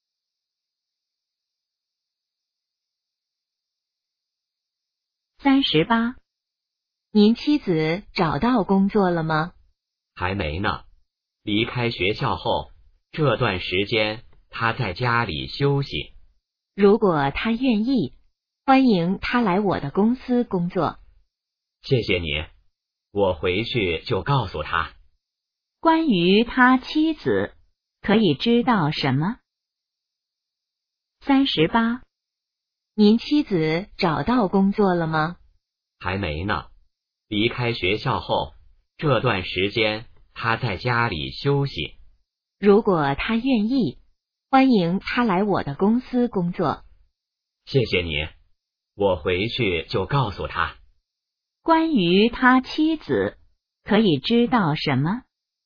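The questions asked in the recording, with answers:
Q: 关于他妻子,可以知道什么?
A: 还没找到工作,在家休息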